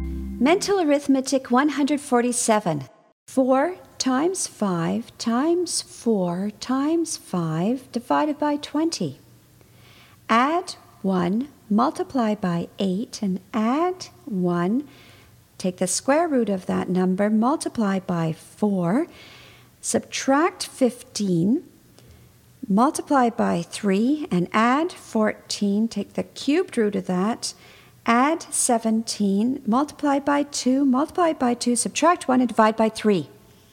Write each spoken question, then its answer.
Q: 4 times 5 times 4 times 5 divided by 20. Add 1, multiply by 8, and add 1. Take the square root of that number, multiply by 4, subtract 15, multiply by 3, and add 14. Take the cubed root of that, add 17, multiply by 2, multiply by 2, subtract 1, and divide by 3.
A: And the answer is 29.